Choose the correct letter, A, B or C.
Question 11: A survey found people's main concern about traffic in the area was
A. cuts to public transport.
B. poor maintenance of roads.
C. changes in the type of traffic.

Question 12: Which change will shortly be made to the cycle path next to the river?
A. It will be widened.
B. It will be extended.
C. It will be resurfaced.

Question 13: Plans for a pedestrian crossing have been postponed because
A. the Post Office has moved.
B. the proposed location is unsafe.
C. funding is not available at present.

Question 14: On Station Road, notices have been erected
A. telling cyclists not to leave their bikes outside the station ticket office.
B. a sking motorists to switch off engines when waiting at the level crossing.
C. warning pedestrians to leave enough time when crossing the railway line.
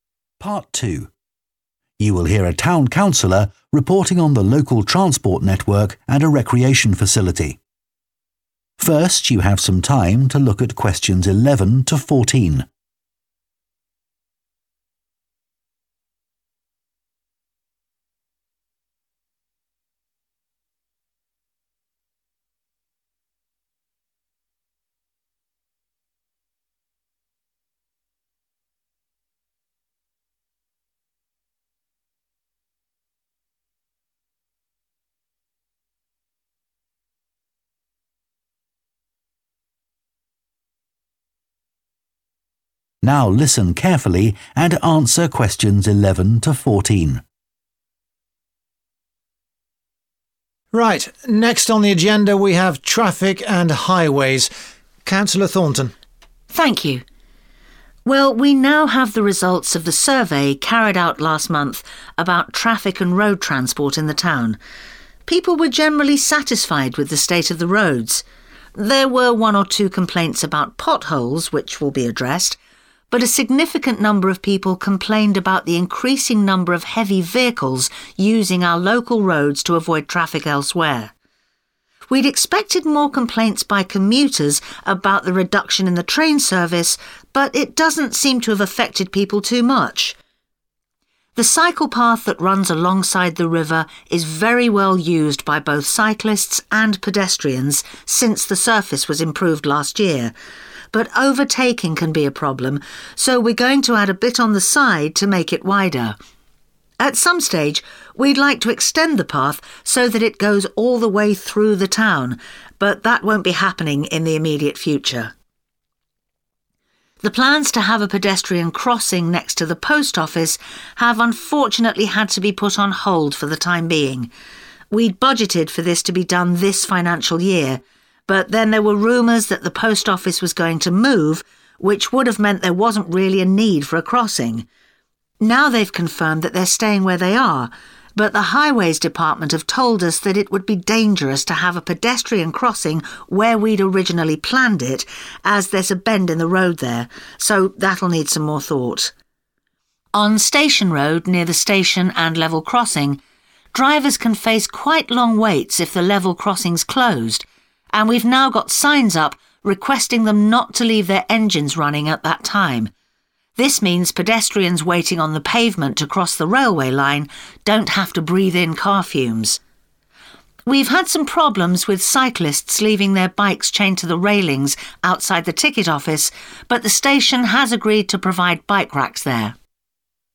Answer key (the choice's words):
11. changes in the type of traffic.
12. It will be widened.
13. the proposed location is unsafe.
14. a sking motorists to switch off engines when waiting at the level crossing.